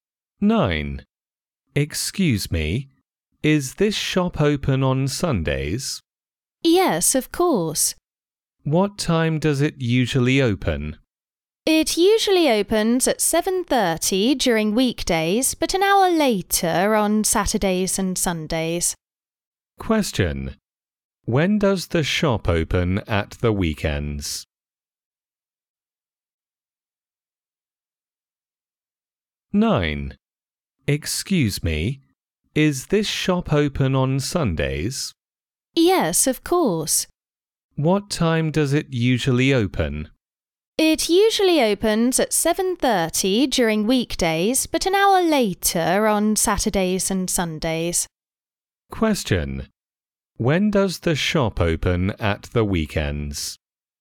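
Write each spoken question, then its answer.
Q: When does the shop open at the weekends?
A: At 8:30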